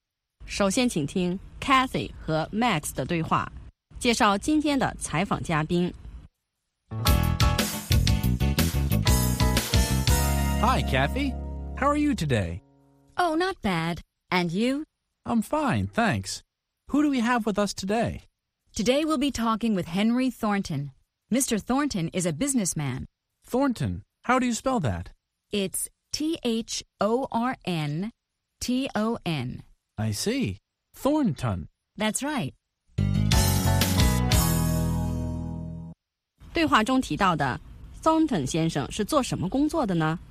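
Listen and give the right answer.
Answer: 商人(businessman)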